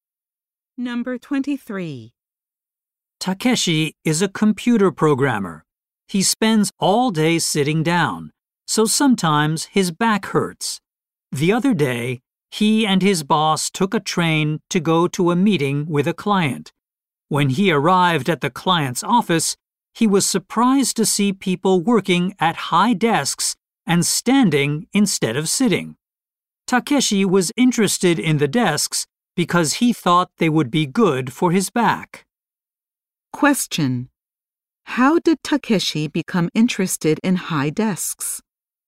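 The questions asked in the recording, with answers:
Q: How did Takeshi become interested in high desks?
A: He saw people using them at a client's office.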